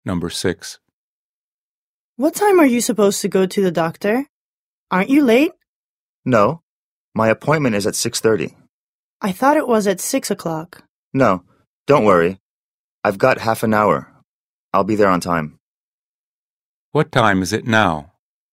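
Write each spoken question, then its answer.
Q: What time is it now?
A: 6:00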